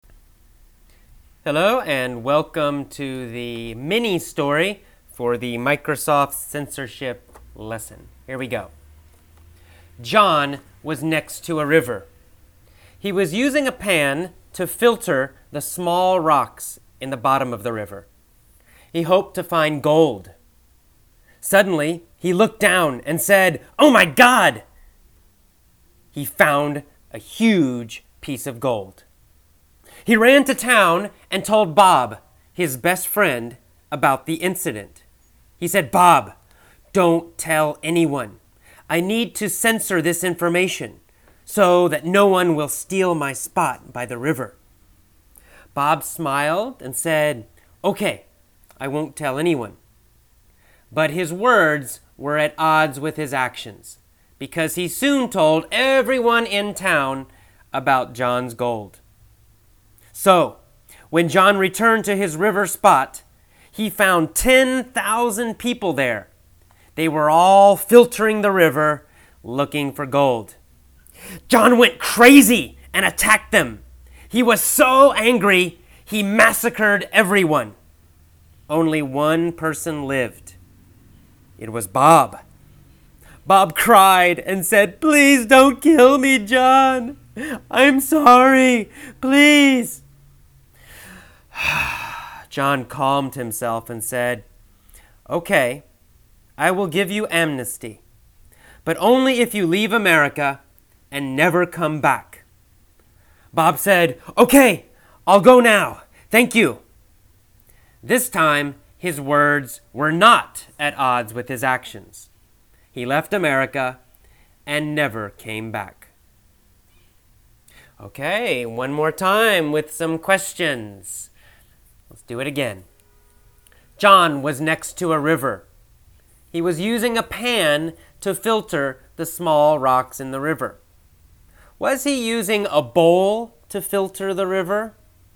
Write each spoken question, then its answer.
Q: Was he using a bowl to filter the river?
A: No, he wasn't using a bowl.